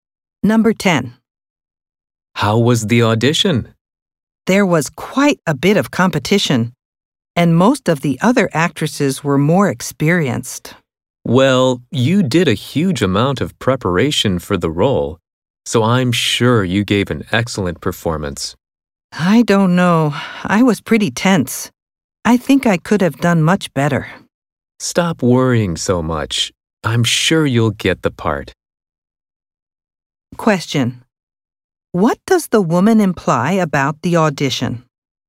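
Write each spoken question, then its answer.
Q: What does the woman imply about the audition?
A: She doesn't think she performed well; she was tense and could have done much better.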